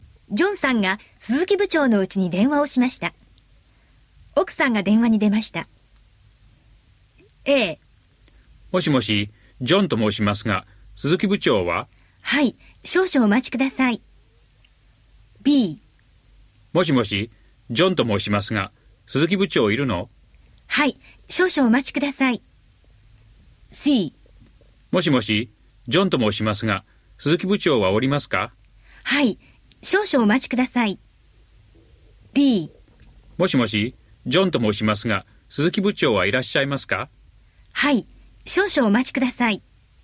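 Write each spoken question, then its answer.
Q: ジョンさんが鈴木部長のうちに電話をしました。奥さんが電話に出ました。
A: D: もしもし、ジョンと申しますが、鈴木部長はいらっしゃいますか?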